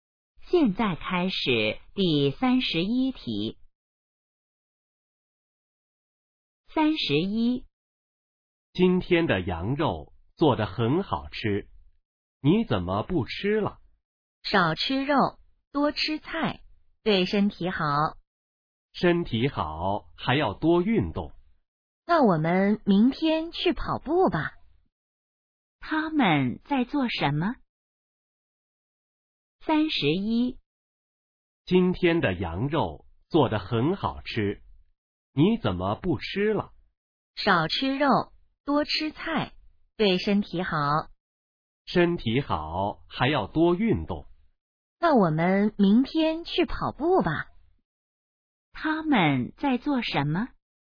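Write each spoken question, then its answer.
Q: 他们在做什么?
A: 吃饭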